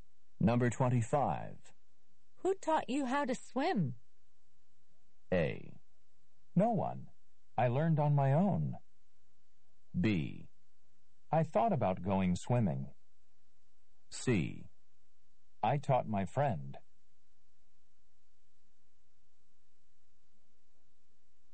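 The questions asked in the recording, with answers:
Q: Who taught you how to swim?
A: A: No one. I learned on my own.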